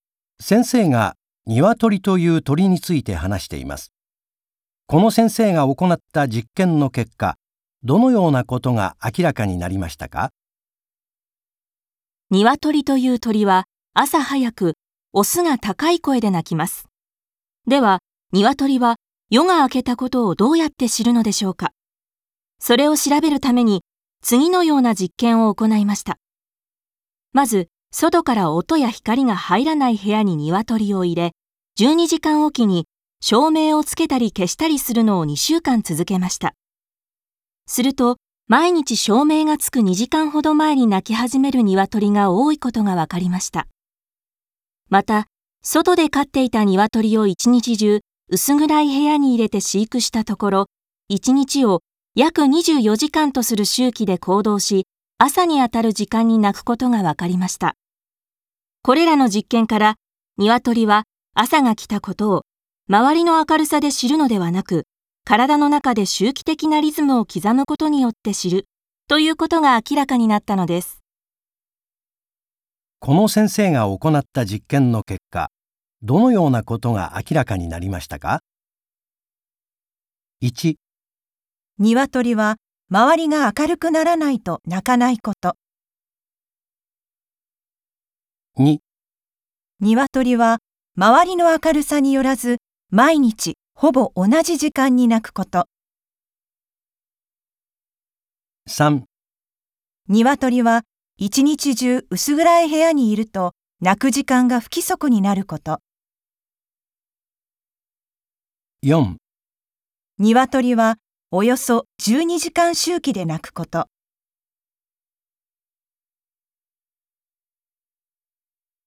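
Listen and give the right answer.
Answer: 2: 鶏は周りの明るさによらず毎日ほぼ同じ時間に鳴くこと。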